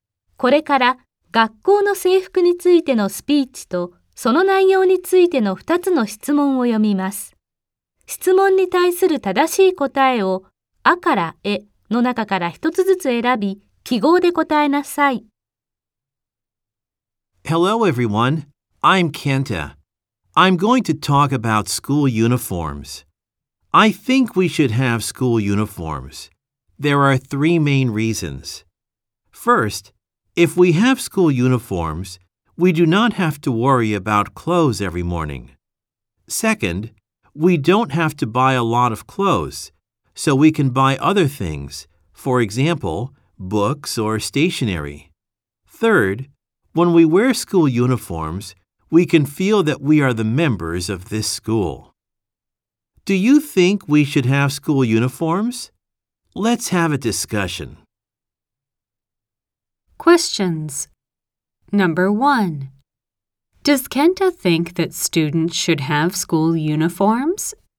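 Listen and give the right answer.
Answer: Yes, he does.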